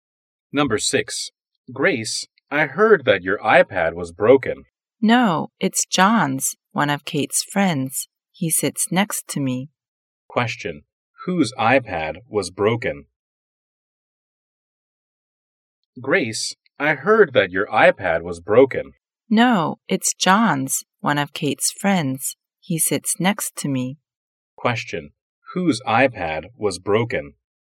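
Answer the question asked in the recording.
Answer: John's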